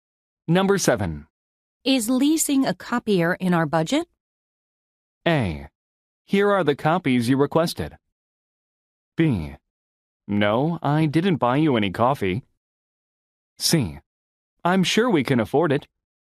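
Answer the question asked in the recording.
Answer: C: I'm sure we can afford it.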